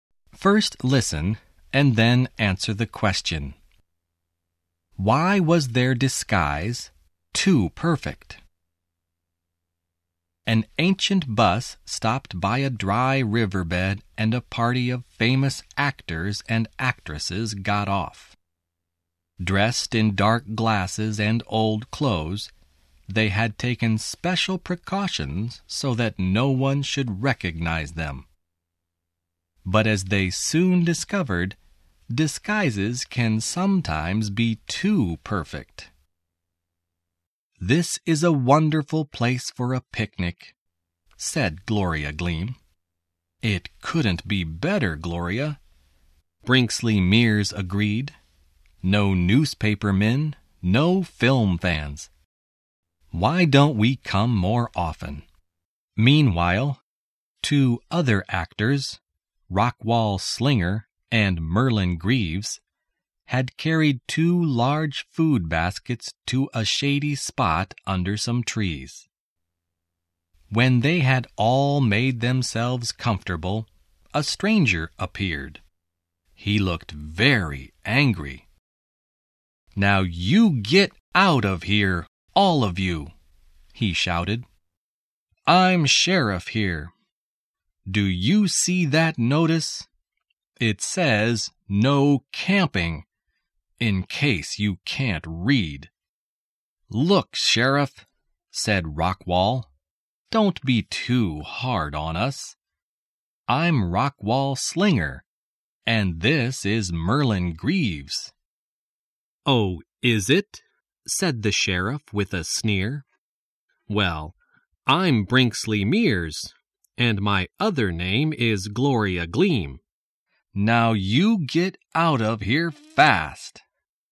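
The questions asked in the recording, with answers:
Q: Why was their disguise too perfect?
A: The sheriff did not recognize them and did not believe they were famous actors.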